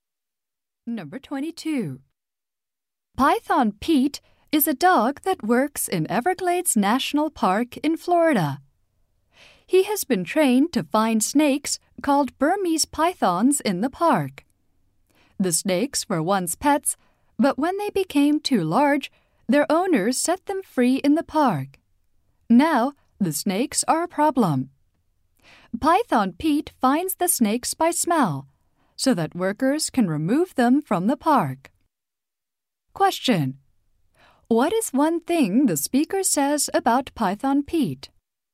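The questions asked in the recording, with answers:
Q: What is one thing the speaker says about Python Pete?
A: He finds pythons by smell so workers can remove them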